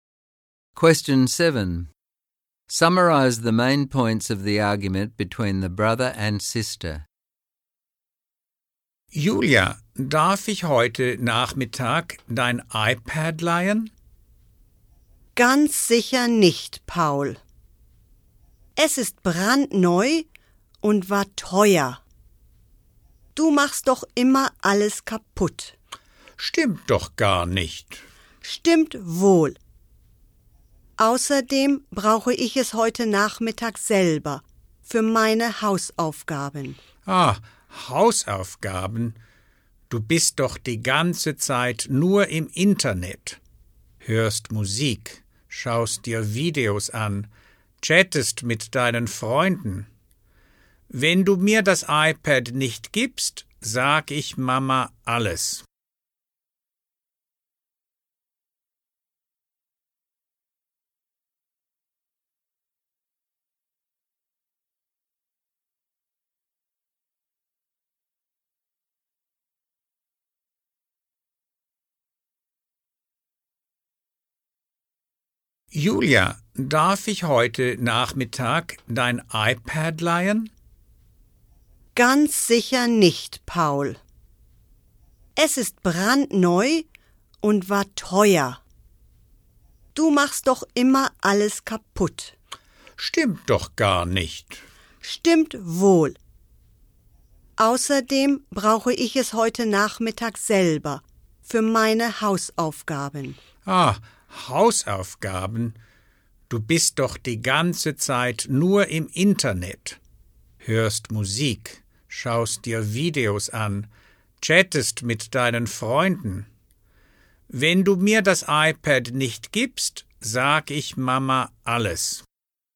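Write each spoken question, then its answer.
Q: Summarize the main points of the argument between the brother and sister.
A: Paul wants to borrow Julia's iPad; she refuses because it is new and expensive, he breaks things, and she needs it for homework; he says she only uses the internet for fun and threatens to tell Mum.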